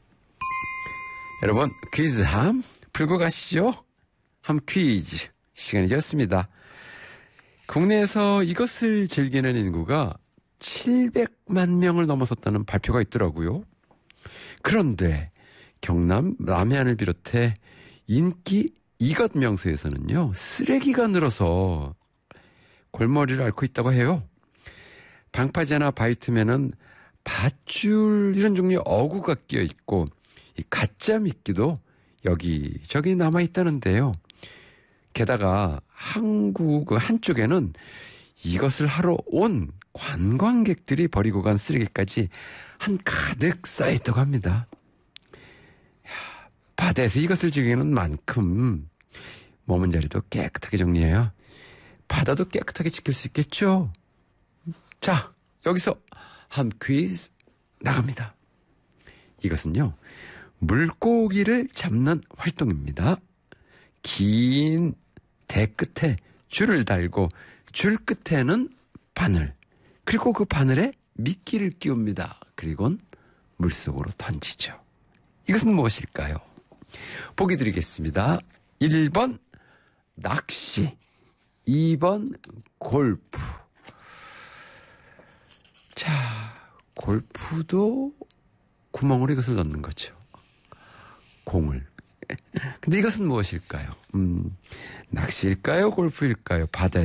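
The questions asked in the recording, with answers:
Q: 근데 이것은 무엇일까요? 낚시일까요? 골프일까요?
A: 1: 낚시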